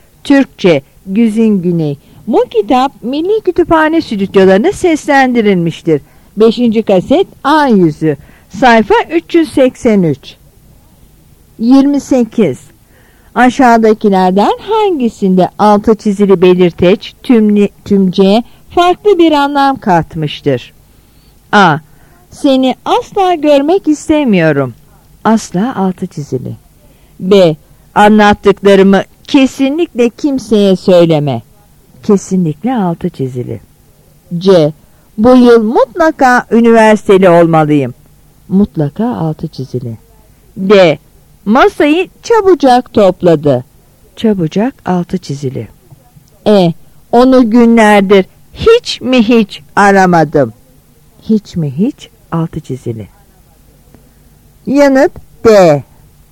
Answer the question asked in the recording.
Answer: Yanıt D.